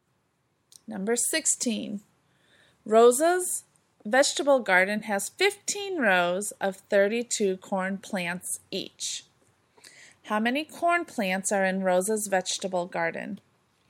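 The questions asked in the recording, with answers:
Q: How many corn plants are in Rosa's vegetable garden?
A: 480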